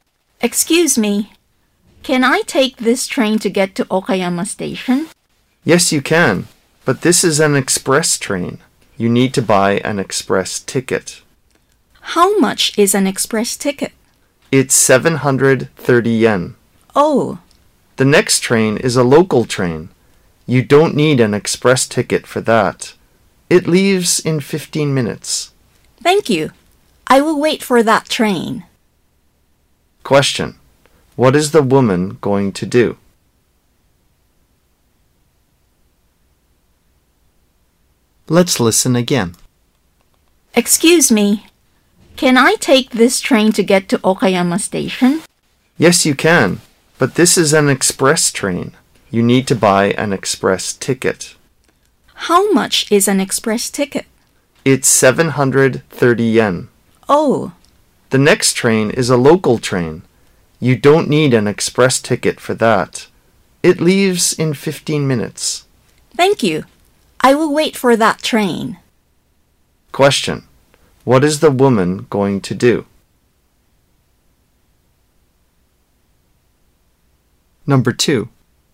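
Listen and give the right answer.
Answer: Wait for the next local train to Okayama Station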